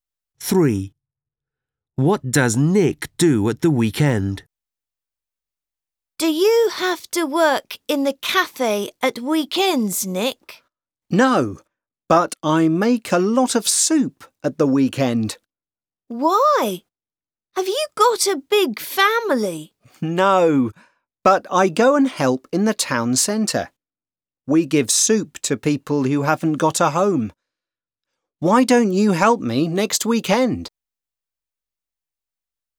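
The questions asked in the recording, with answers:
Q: What does Nick do at the weekend?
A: He makes soup and gives it to homeless people in the town centre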